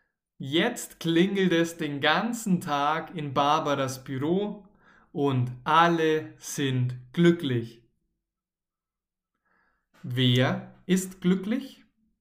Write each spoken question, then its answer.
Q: Wer ist glücklich?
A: Alle, alle